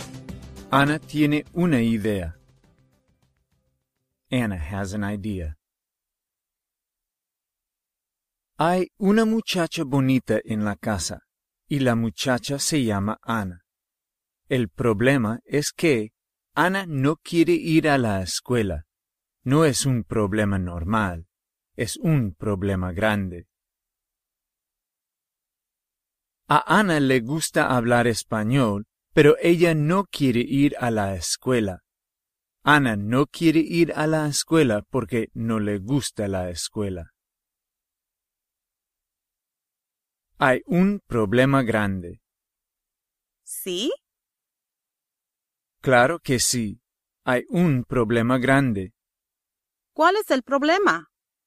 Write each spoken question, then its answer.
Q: ¿Cuál es el problema?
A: Anna quiere hablar español, pero ella no quiere ir a la escuela.